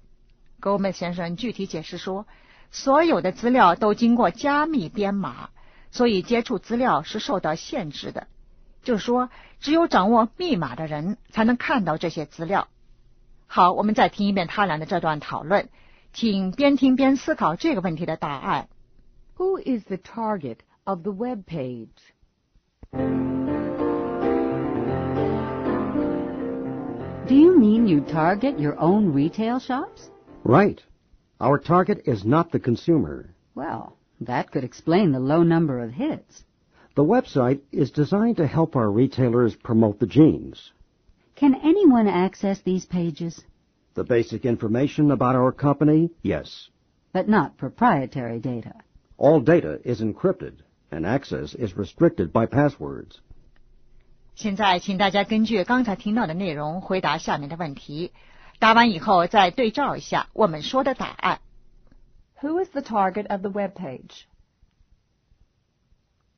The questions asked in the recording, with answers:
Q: Who is the target of the web page?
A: Retail shops.